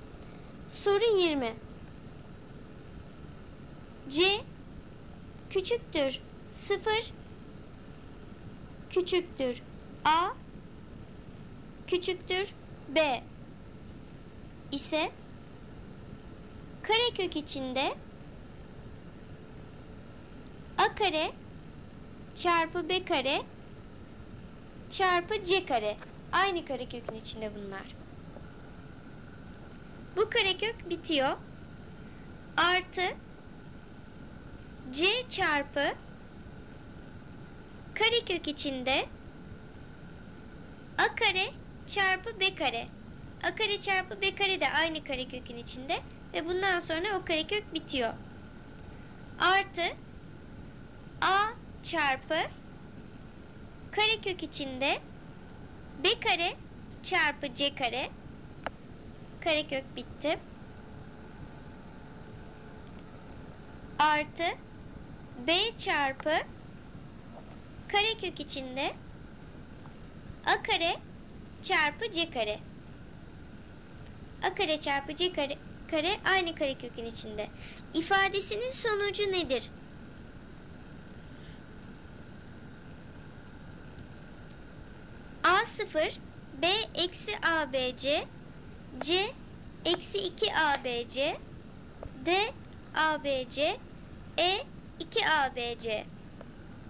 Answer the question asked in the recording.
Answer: Doğru cevap C eksi 2 ABC.